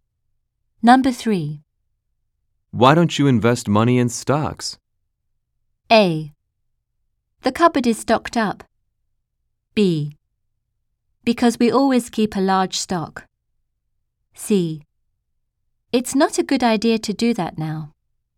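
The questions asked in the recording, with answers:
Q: Why don't you invest money in stocks?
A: C: It's not a good idea to do that now.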